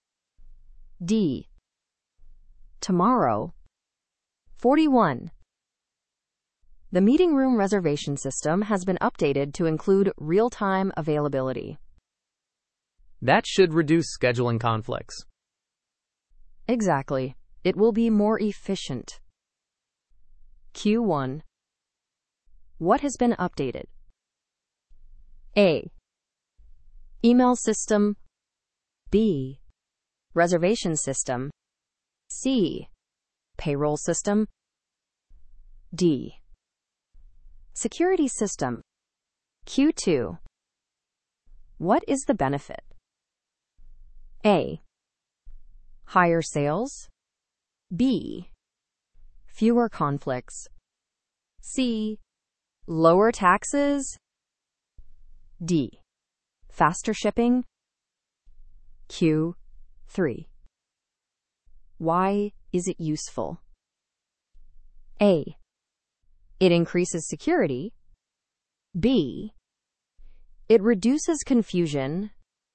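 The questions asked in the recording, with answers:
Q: What has been updated?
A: B: Reservation system.

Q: What is the benefit?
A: B: Fewer conflicts.

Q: Why is it useful?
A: B: It reduces confusion.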